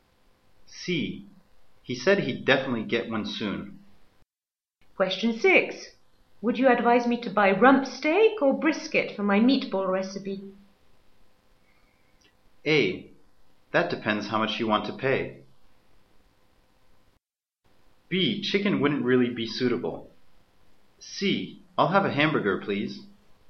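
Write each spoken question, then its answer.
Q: Would you advise me to buy rump steak or brisket for my meatball recipe?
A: A: That depends how much you want to pay.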